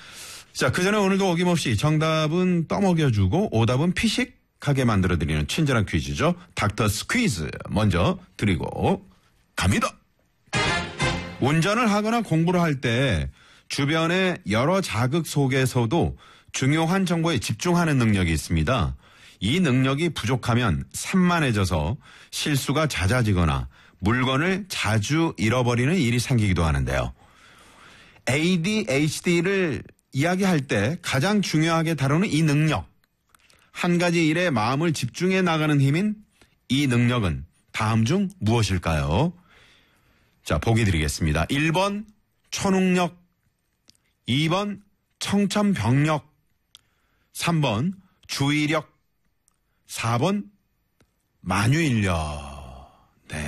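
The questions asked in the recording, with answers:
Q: 한 가지 일에 마음을 집중해 나가는 힘인 이 능력은 다음 중 무엇일까요?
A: 3: 주의력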